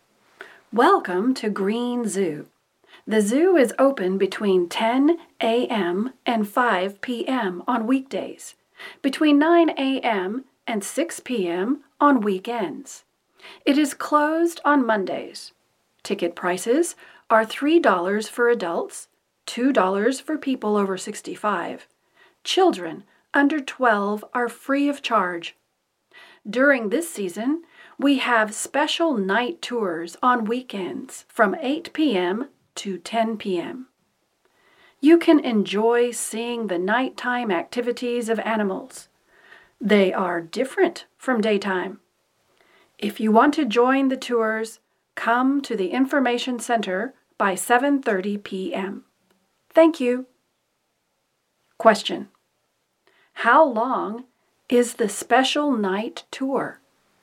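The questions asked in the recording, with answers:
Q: How long is the special night tour?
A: Two hours (8 p.m. to 10 p.m.)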